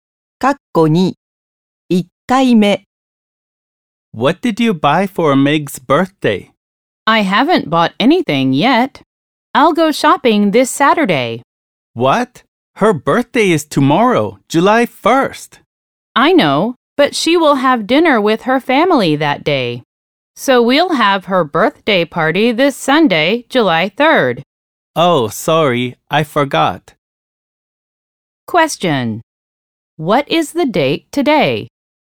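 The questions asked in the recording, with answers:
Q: What is the date today?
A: June 30th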